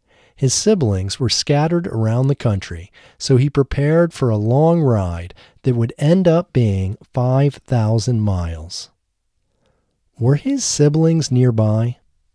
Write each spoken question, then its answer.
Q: Were his siblings nearby?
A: No, his siblings weren't nearby.